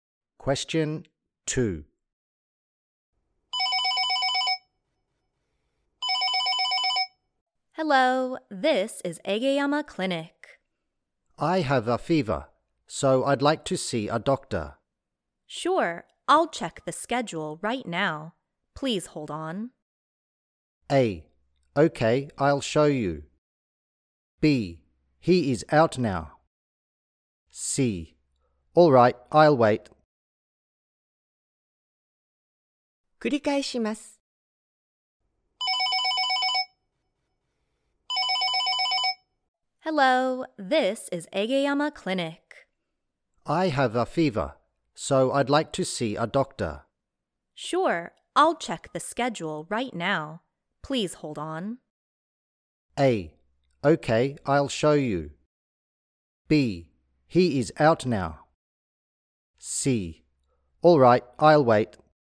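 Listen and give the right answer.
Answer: C: All right, I'll wait.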